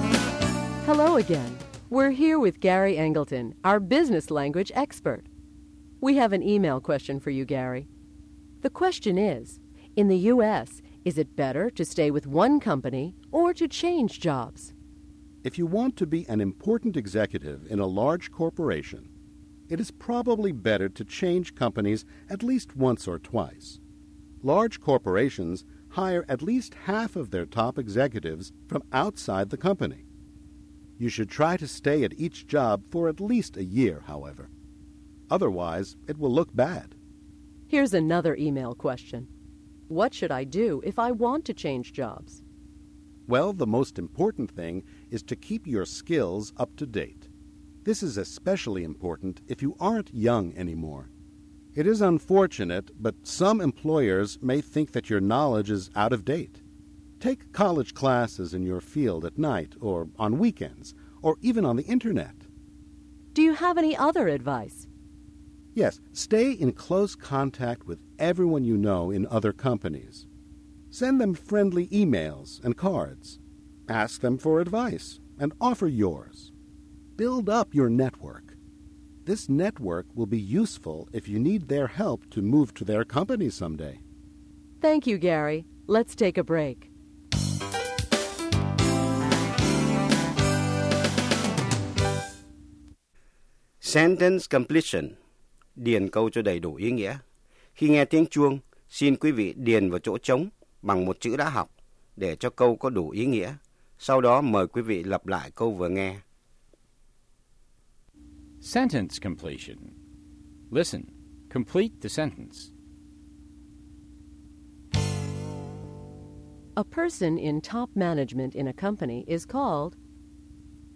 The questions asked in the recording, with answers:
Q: A person in top management in a company is called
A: an executive. The person is called an executive.